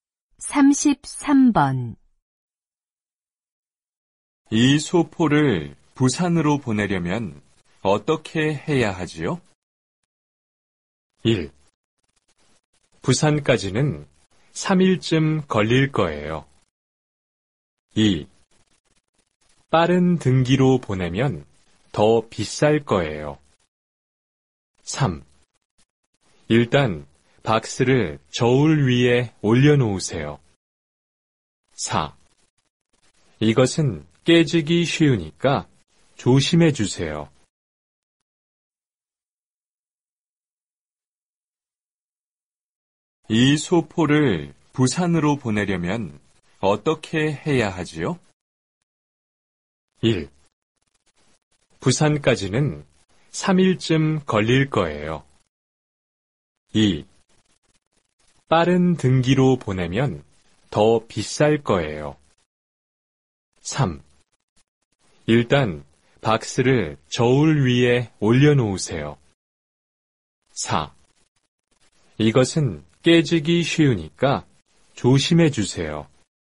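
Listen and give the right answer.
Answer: 3: 일단 박스를 저울 위에 올려놓으세요.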